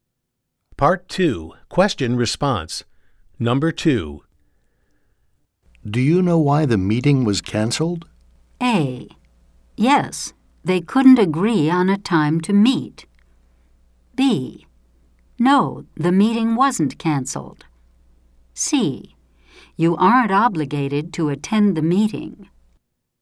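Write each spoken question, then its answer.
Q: Do you know why the meeting was canceled?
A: A: Yes, they couldn't agree on a time to meet.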